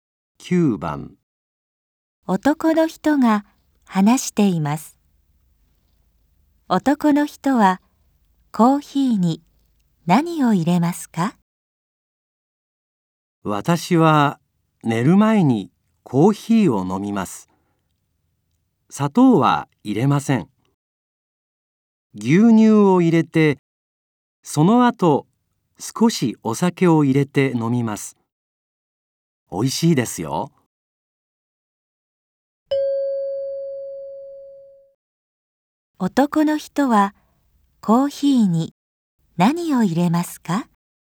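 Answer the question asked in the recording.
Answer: 牛乳と少しのお酒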